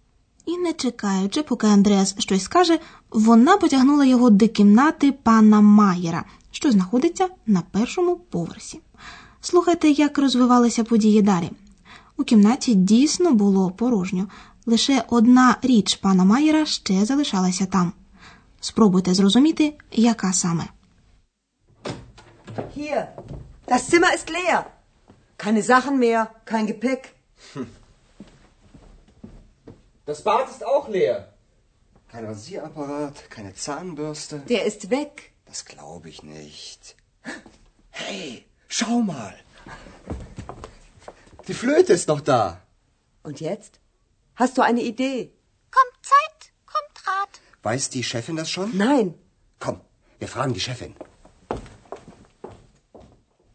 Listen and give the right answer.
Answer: Отже, пан Майєр забув у кімнаті свою флейту.